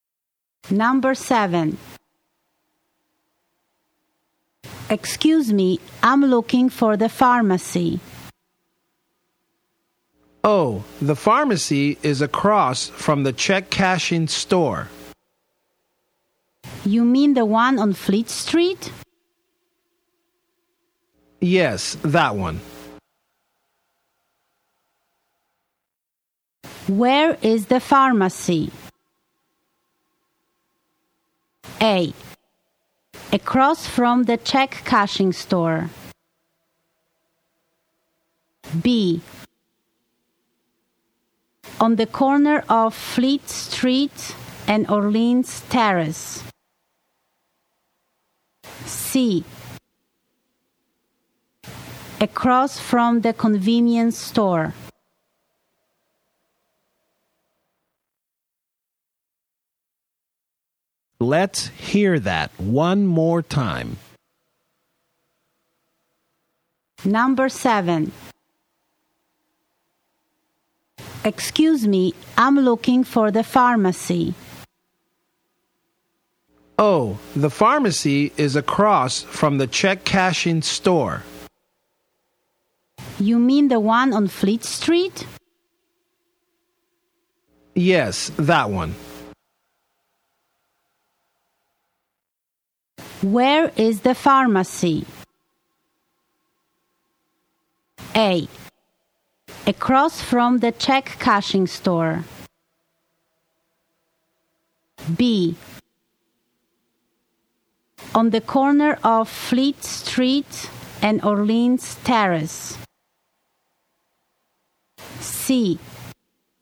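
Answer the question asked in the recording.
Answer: A: Across from the check cashing store.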